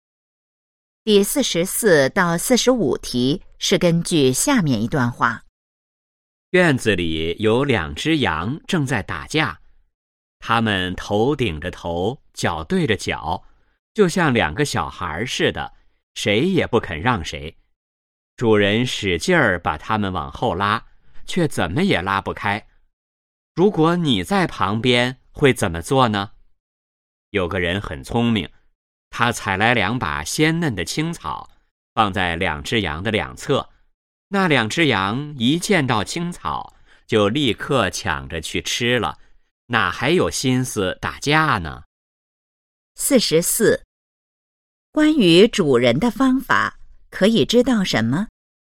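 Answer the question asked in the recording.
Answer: 没有用,怎么也拉不开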